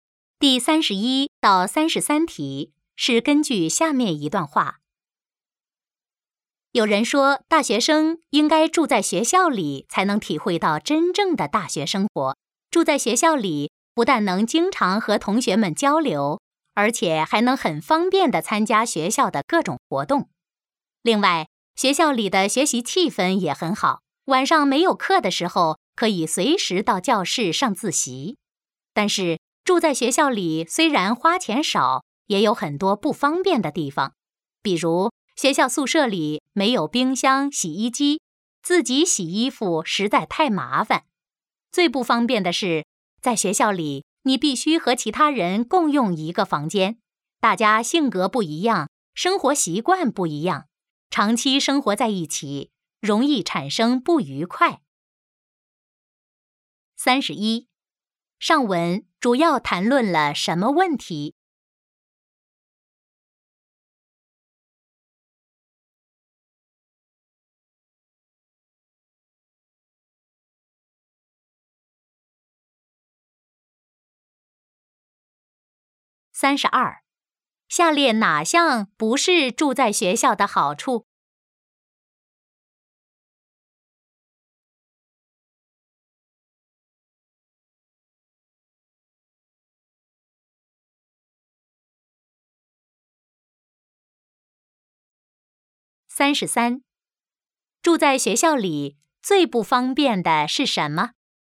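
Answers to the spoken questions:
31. 大学生住在学校里的好处和不便
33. 必须和其他人共用一个房间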